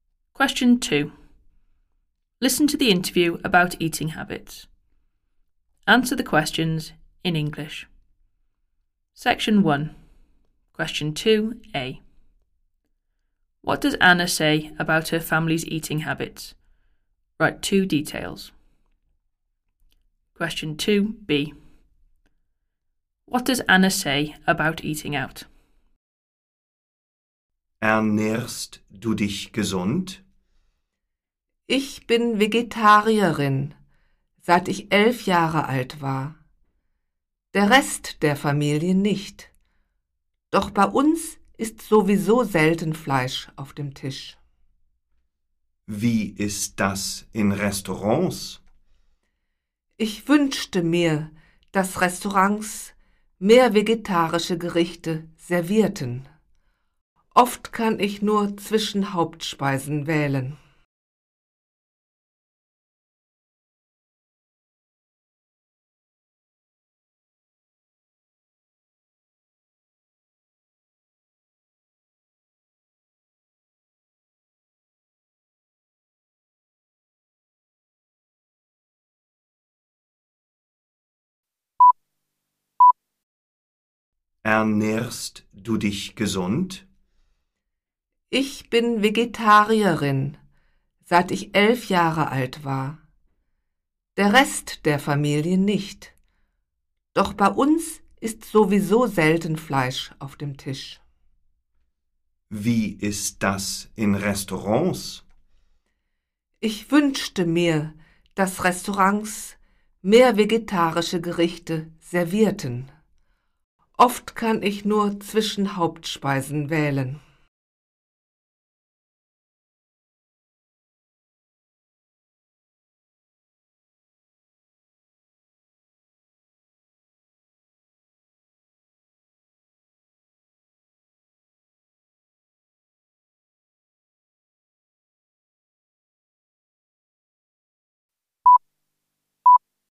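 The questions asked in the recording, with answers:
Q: What does Anna say about her family's eating habits?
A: She has been vegetarian since age 11; the rest of the family isn't, but they rarely eat meat anyway

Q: What does Anna say about eating out?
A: She wishes restaurants served more vegetarian dishes; she often has little choice of main courses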